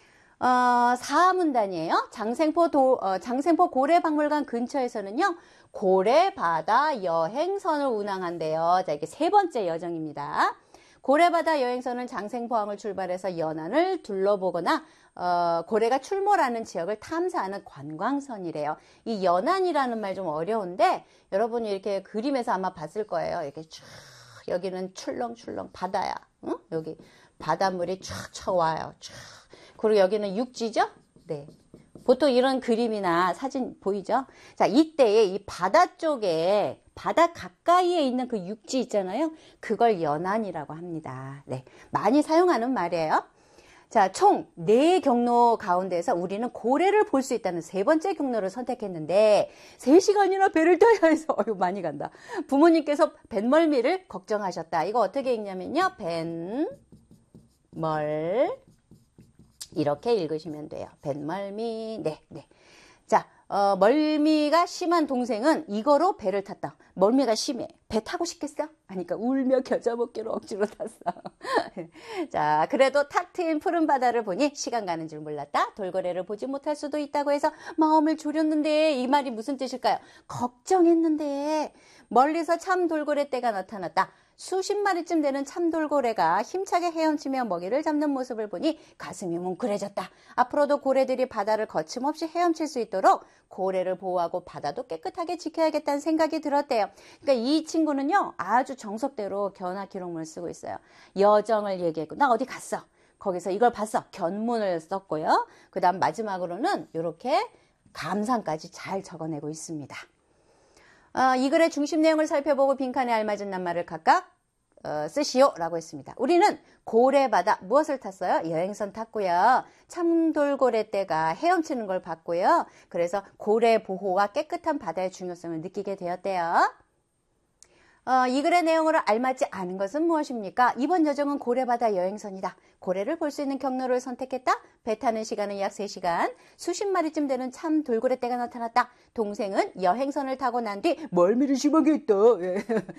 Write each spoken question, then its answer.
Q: 이 글의 내용으로 알맞지 않은 것은 무엇입니까?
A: 울며 겨자 먹기로 타긴 했지만 멀미했다는 말은 또 없네요.